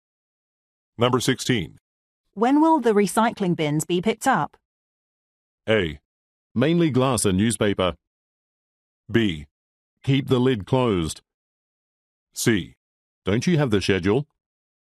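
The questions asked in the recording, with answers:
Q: When will the recycling bins be picked up?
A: C: Don't you have the schedule?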